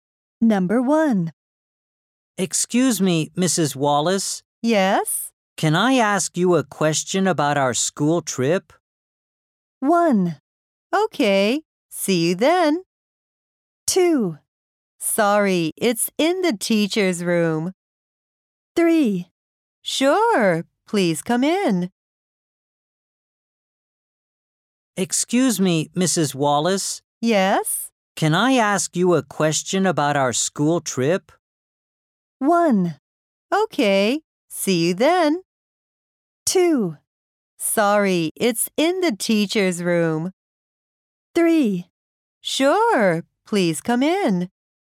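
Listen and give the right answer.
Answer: 3: Sure, please come in.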